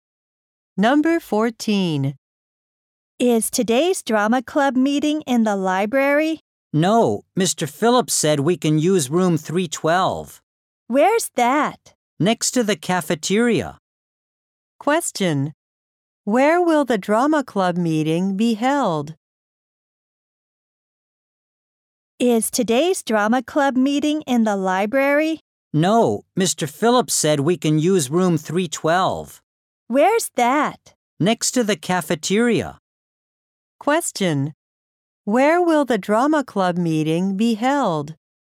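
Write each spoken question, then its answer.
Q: Where will the drama club meeting be held?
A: In room 312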